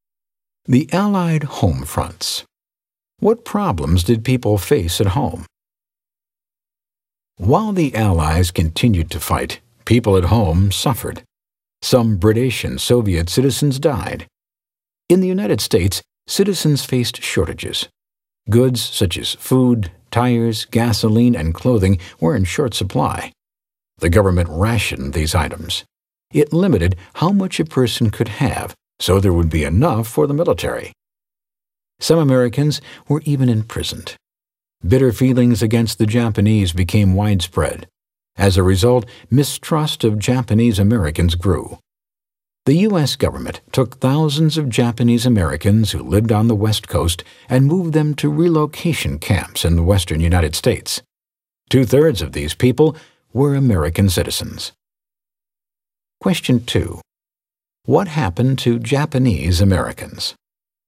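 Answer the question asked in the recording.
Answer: Thousands on the West Coast were moved to relocation camps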